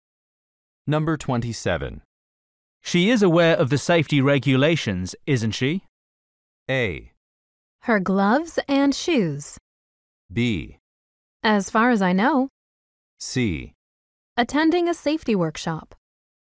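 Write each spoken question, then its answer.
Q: She is aware of the safety regulations, isn't she?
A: B: As far as I know.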